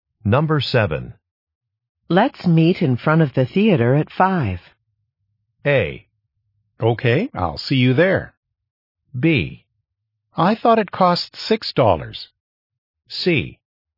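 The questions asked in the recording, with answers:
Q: Let's meet in front of the theater at 5.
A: A: Okay, I'll see you there.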